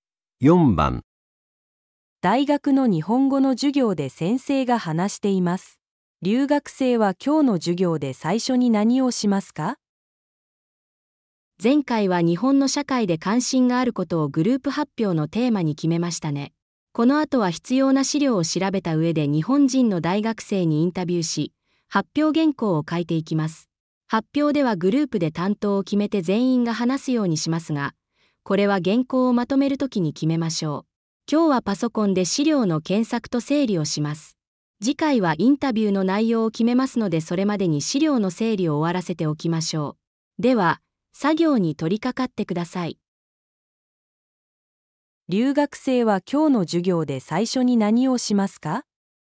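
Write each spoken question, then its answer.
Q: 留学生は今日の授業で最初に何をしますか?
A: パソコンで資料の検索と整理をする

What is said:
大学の日本語の授業で先生が話しています。留学生は今日の授業で最初に何をしますか。
女:前回は日本の社会で関心があることをグループ発表のテーマに決めましたね。この後は必要な資料を調べた上で日本人の大学生にインタビューし、発表原稿を書いていきます。発表ではグループで担当を決めて全員が話すようにしますが、これは原稿をまとめる時に決めましょう。今日はパソコンで資料の検索と整理をします。次回はインタビューの内容を決めますのでそれまでに資料の整理を終わらせておきましょう。では、作業に取り掛かってください。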